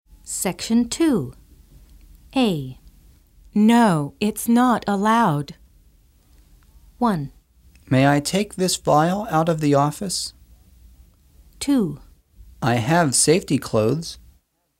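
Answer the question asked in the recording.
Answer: 1: May I take this vial out of the office?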